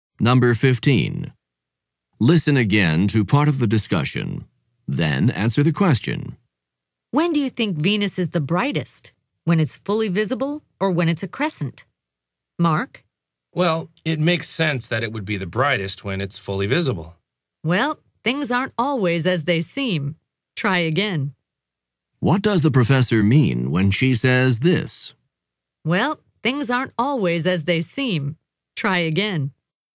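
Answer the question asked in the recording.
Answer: She means Mark's answer is wrong: Venus is not brightest when fully visible.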